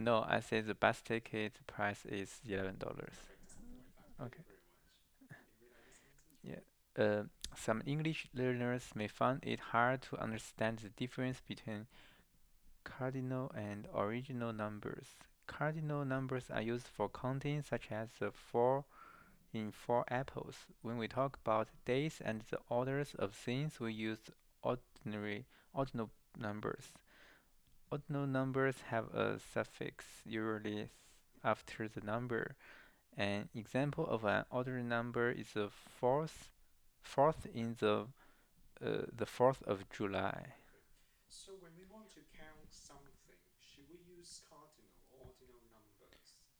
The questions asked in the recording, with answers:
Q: So when we want to count something, should we use cardinal or ordinal numbers?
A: We should use cardinal numbers.